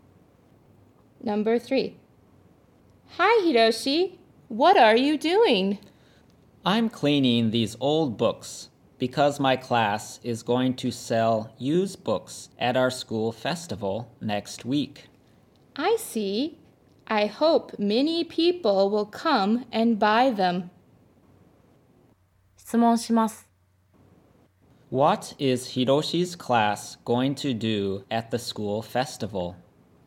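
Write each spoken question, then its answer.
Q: What is Hiroshi's class going to do at the school festival?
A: Sell used books.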